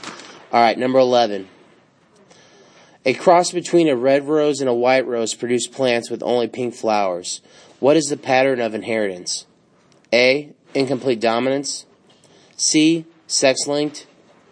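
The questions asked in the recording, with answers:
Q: What is the pattern of inheritance?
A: A: incomplete dominance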